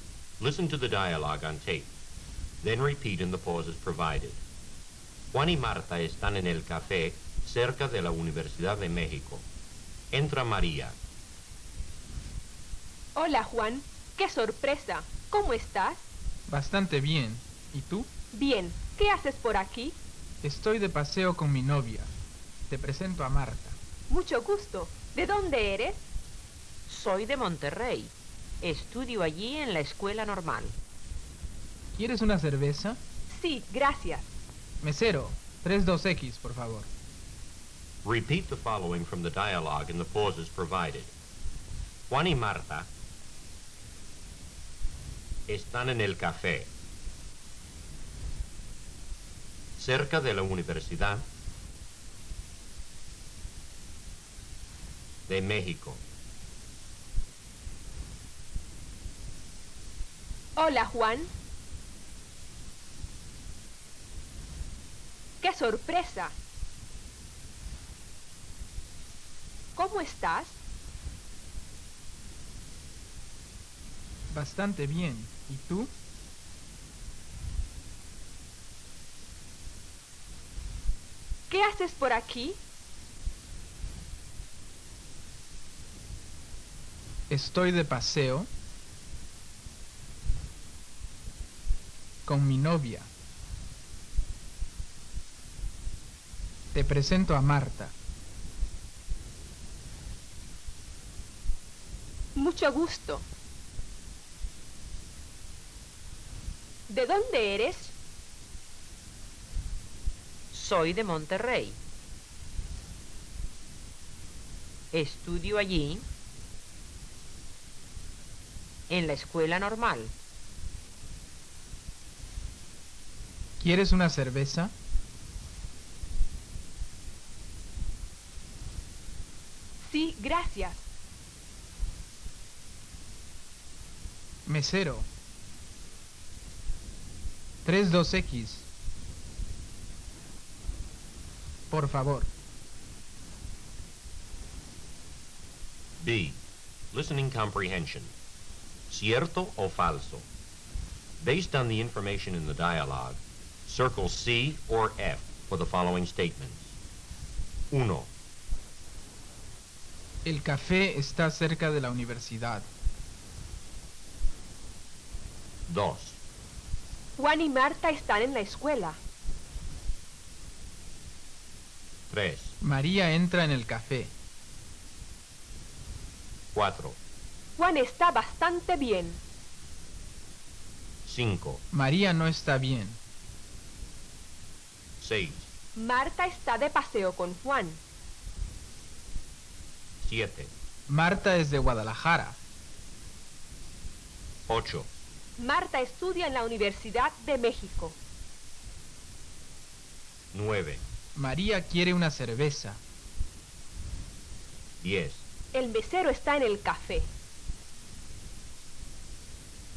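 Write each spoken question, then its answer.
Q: El café está cerca de la universidad.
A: C (cierto)

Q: Juan y Marta están en la escuela.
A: F (falso)

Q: María entra en el café.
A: C (cierto)

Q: Juan está bastante bien.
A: C (cierto)

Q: María no está bien.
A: F (falso)

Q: Marta está de paseo con Juan.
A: C (cierto)

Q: Marta es de Guadalajara.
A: F (falso)

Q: Marta estudia en la Universidad de México.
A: F (falso)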